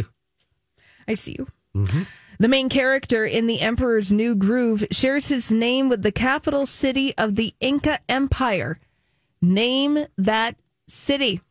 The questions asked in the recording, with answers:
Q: Name that city.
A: The name is Cusco.